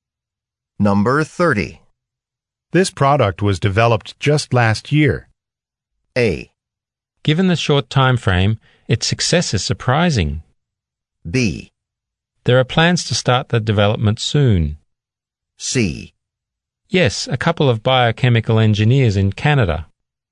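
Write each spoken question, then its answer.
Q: This product was developed just last year.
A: A: Given the short time frame, its success is surprising.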